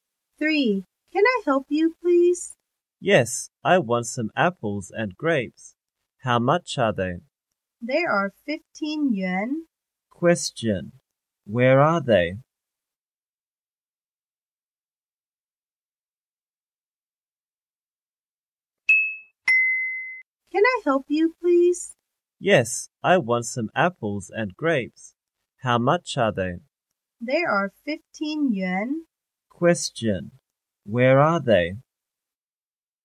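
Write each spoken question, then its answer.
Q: Where are they?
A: In a shop (fruit shop).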